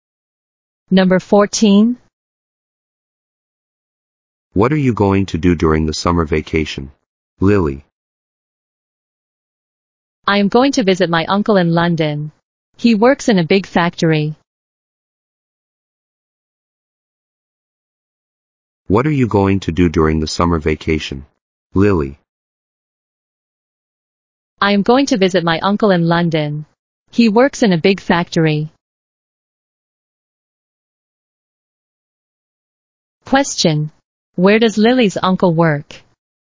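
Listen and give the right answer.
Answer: In a big factory in London.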